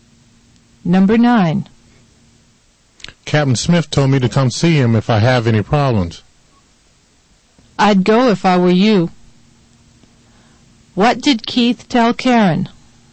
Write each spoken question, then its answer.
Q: What did Keith tell Karen?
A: Keith told Karen that Captain Smith told him.